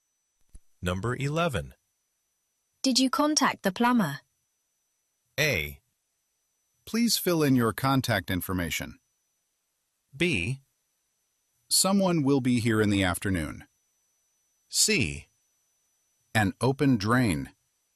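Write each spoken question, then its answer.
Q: Did you contact the plumber?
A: B: Someone will be here in the afternoon.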